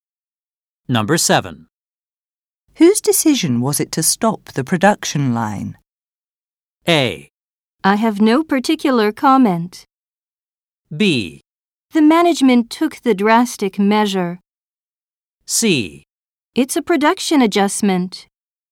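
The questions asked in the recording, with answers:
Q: Whose decision was it to stop the production line?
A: B: The management took the drastic measure.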